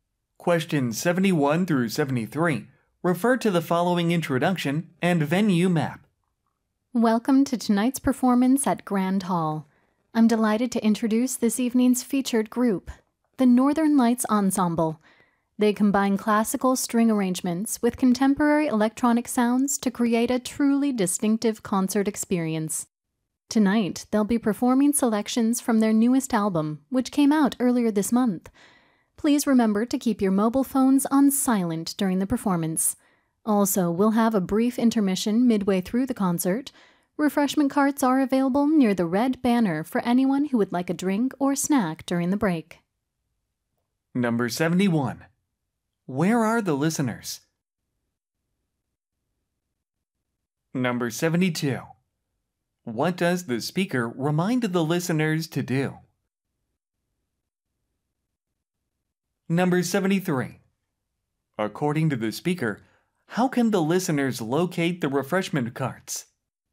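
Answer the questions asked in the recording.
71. B번 at a concert
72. Keep their mobile phones on silent
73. Look for the red banner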